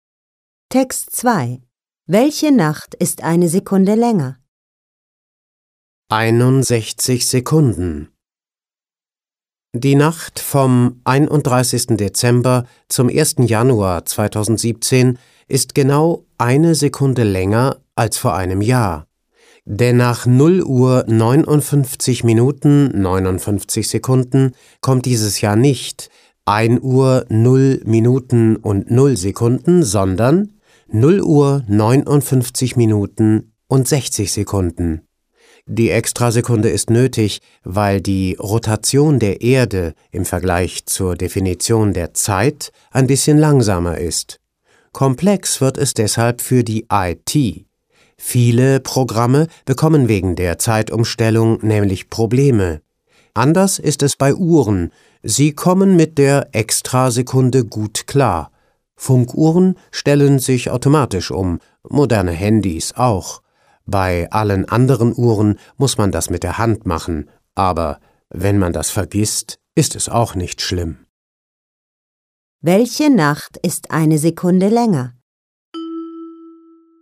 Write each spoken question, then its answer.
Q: Welche Nacht ist eine Sekunde länger?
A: Die Nacht vom 31. Dezember zum 1. Januar 2017 ist genau eine Sekunde länger als vor einem Jahr.